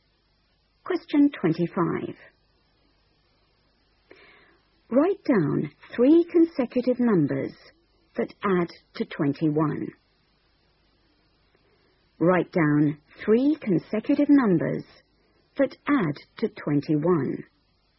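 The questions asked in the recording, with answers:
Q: Write down 3 consecutive numbers that add to 21.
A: 6, 7, 8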